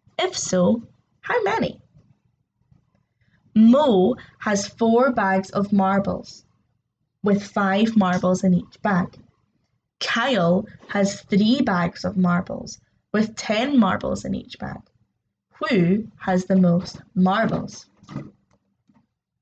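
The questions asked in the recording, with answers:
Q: Who has the most marbles?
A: Kyle (30 marbles; Mo has 20)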